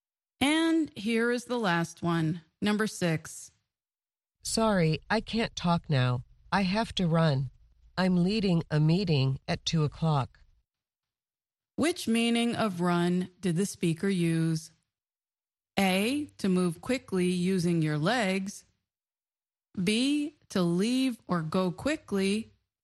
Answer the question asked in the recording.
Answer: The answer is B, to leave or go quickly.